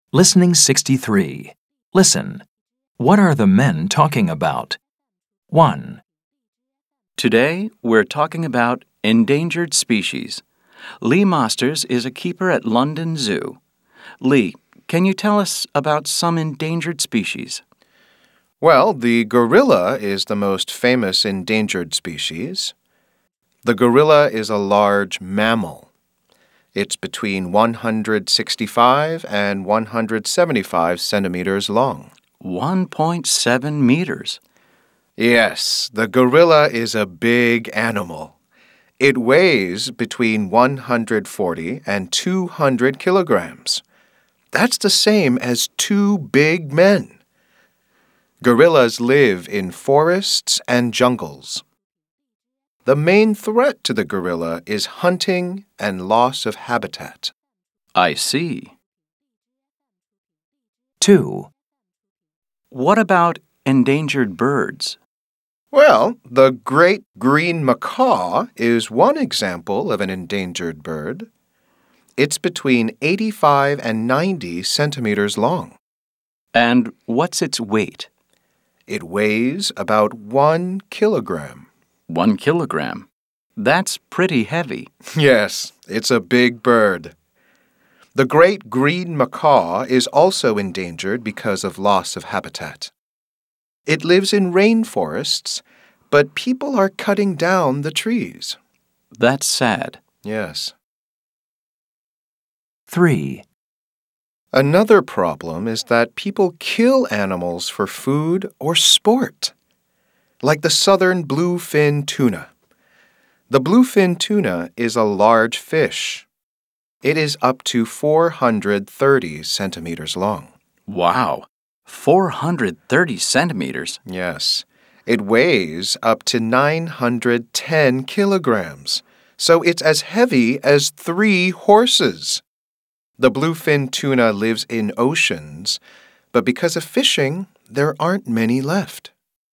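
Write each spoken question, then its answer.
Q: What are the men talking about?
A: Endangered species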